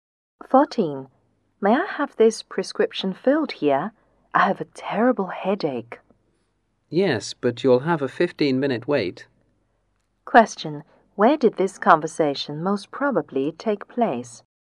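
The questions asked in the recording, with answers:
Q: Where did this conversation most probably take place?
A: At a pharmacy.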